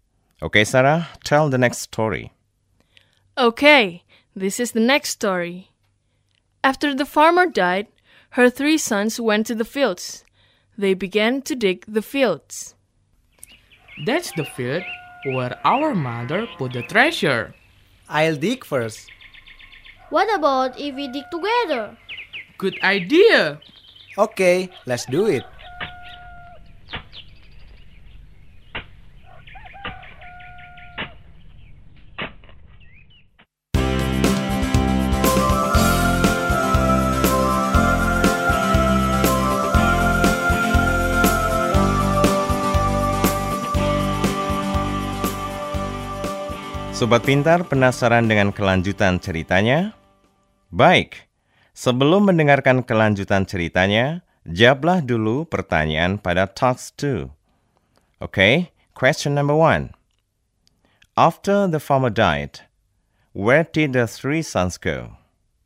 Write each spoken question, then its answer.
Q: After the farmer died, where did the three sons go?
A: To the fields. Yes, right.